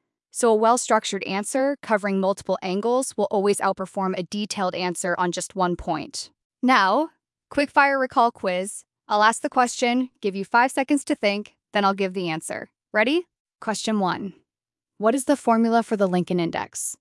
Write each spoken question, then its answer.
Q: What is the formula for the Lincoln Index?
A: The answer is N equals N_e times N_tui divided by N.